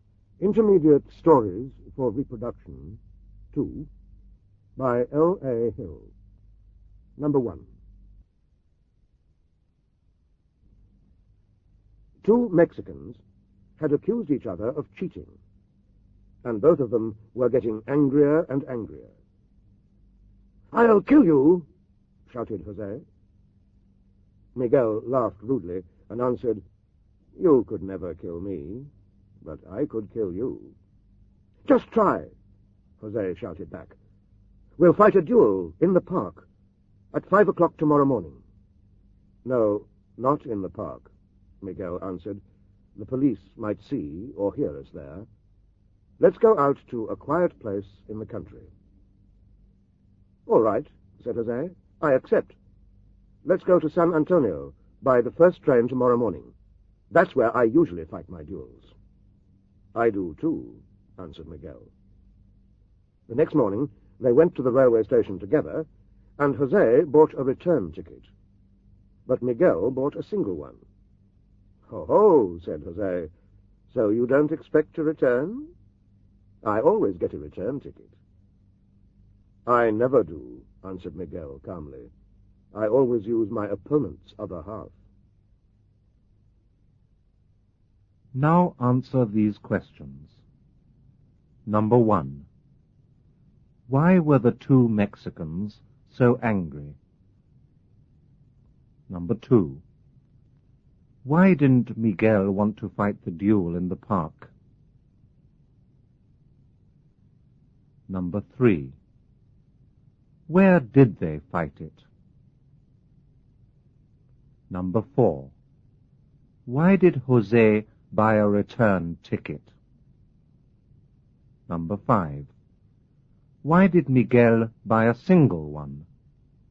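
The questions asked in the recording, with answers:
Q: Why were the two Mexicans so angry?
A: Because they had accused each other of cheating.

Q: Why didn't Miguel want to fight the duel in the park?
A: Because the police might see or hear them there.

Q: Where did they fight it?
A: In San Antonio, a quiet place in the country.

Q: Why did Jose buy a return ticket?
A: Because he expected to come back alive; he always got a return ticket.

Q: Why did Miguel buy a single one?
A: Because he expected to kill Jose and use the other half of his return ticket.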